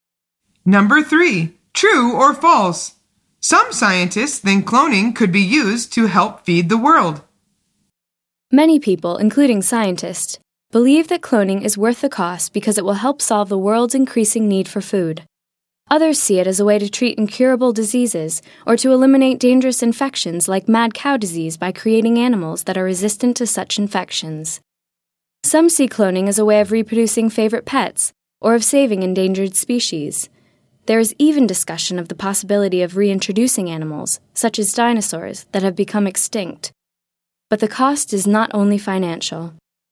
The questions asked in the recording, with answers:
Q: True or false? Some scientists think cloning could be used to help feed the world.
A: The answer is true.